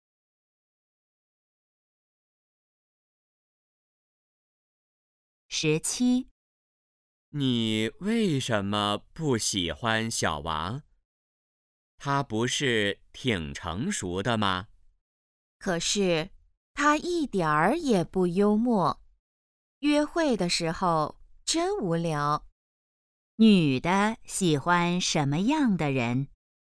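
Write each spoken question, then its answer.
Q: 女的喜欢什么样的人?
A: 幽默的人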